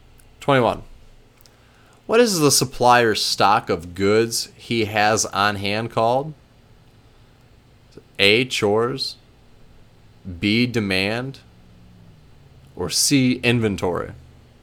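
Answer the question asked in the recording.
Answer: C: inventory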